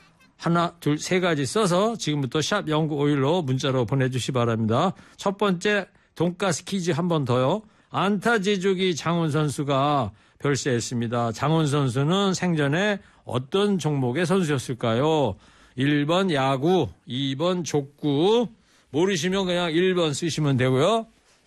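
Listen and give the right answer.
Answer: 1: 야구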